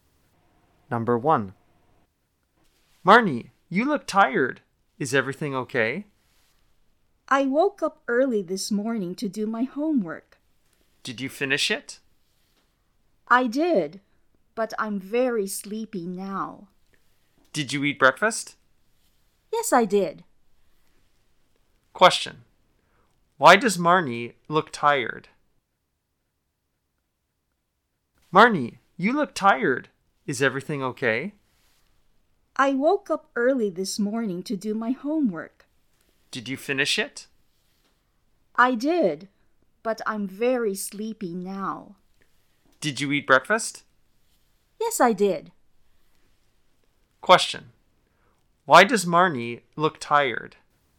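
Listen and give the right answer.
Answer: She woke up early this morning to do her homework.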